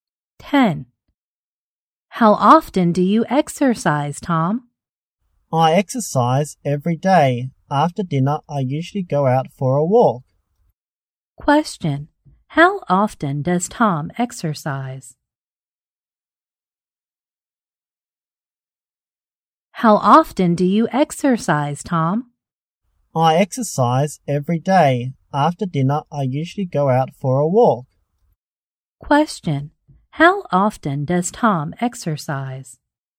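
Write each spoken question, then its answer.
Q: How often does Tom exercise?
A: Every day.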